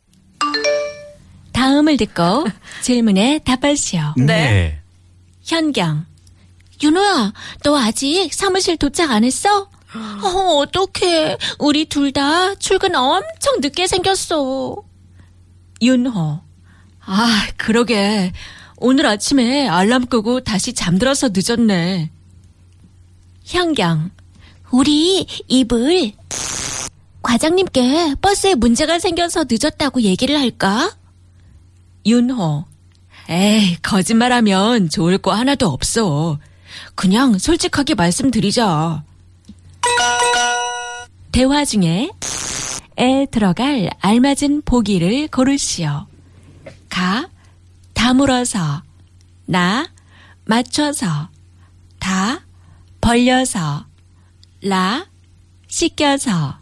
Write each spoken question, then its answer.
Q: 대화 중에 에 들어갈 알맞은 보기를 고르시오.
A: 나 맞추다, to match, to assemble.